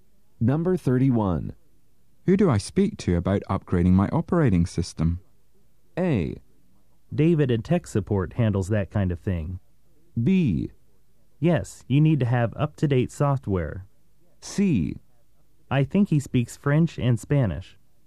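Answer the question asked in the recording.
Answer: A: David and tech support handles that kind of thing.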